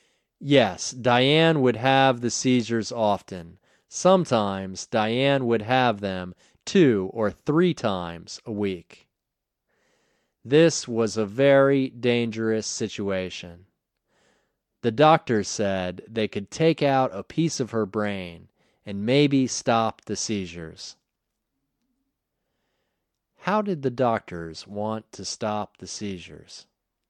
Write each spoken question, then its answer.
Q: How did the doctors want to stop the seizures?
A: The doctors wanted to stop the seizures by taking out a piece of her brain.